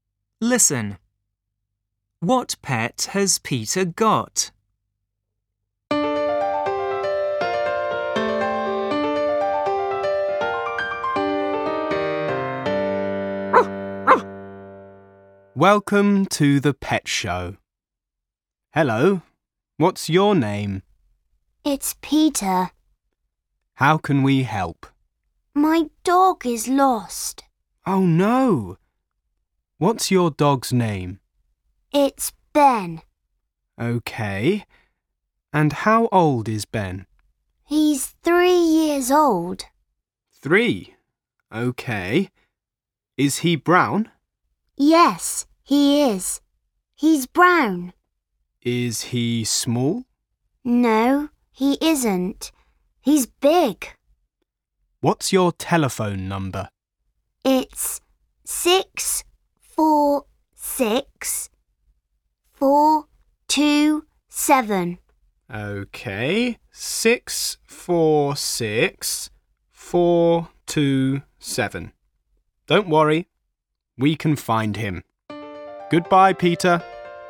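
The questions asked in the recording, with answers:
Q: What pet has Peter got?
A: A dog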